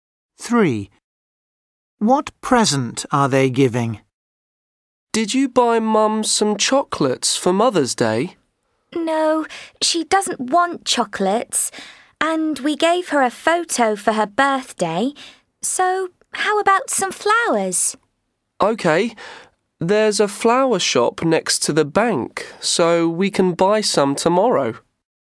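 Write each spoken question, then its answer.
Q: What present are they giving?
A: flowers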